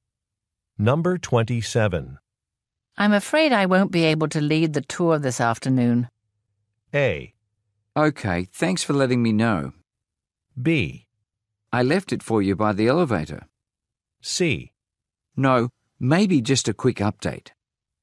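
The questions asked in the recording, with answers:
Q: I'm afraid I won't be able to lead the tour this afternoon.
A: A: Okay, thanks for letting me know.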